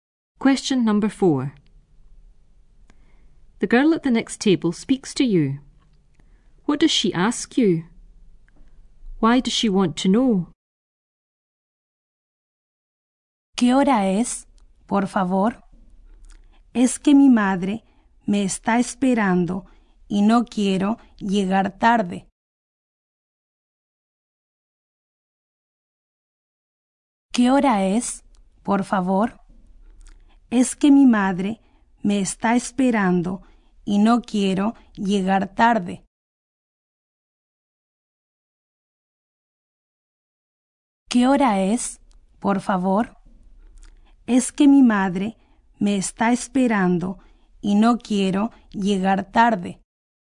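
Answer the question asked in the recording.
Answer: What time it is; her mother is waiting for her and she doesn't want to be late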